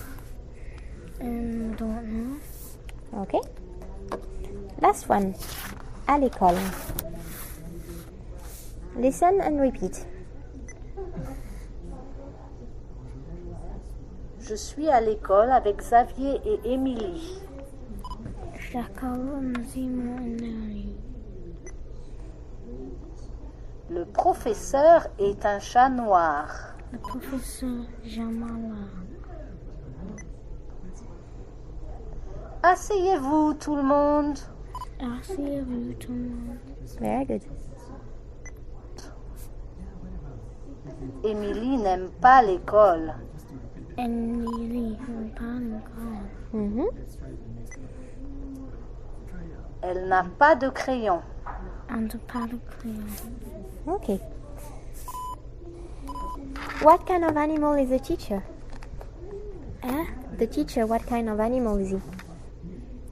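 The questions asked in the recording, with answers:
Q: What kind of animal is the teacher?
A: A black cat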